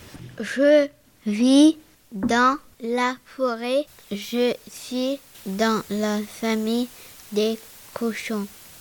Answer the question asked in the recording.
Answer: Je suis le sanglier.